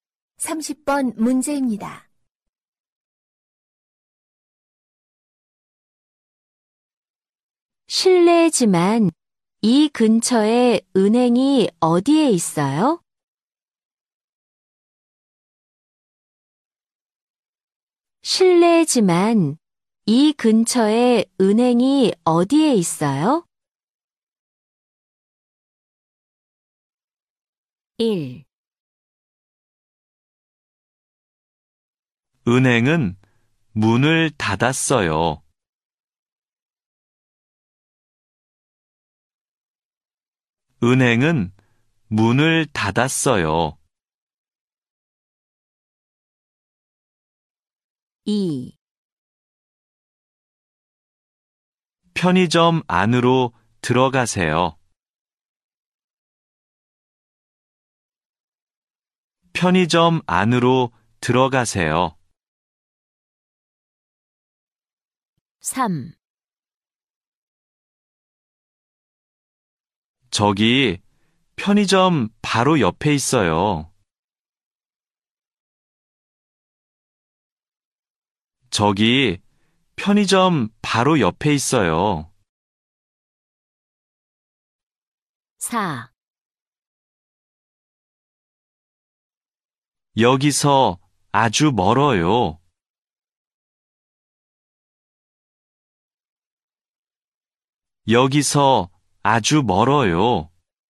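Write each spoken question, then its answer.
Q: 실례지만 이 근처에 은행이 어디에 있어요?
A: 3: 저기 편의점 바로 옆에 있어요.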